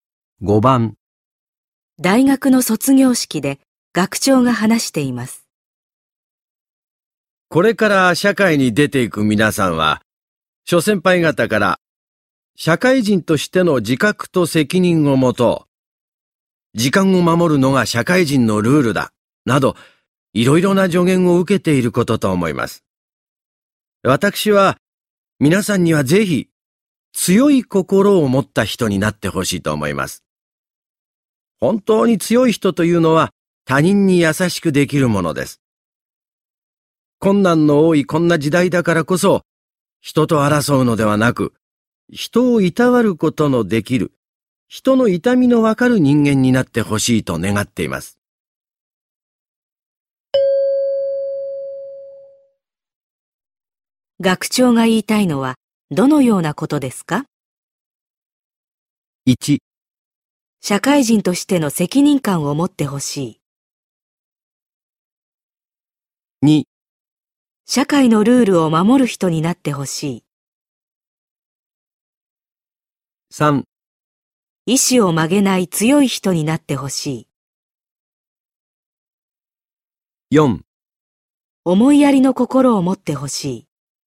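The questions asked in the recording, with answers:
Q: 学長が言いたいのはどのようなことですか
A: 4: 思いやりの心を持ってほしい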